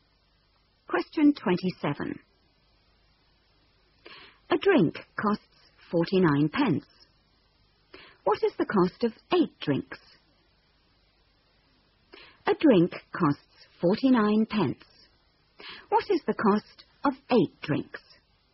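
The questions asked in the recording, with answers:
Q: What is the cost of 8 drinks?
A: £3.92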